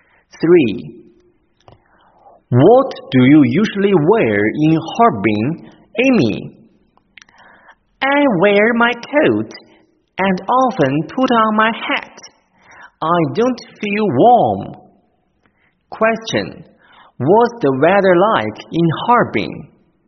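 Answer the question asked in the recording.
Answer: It's cold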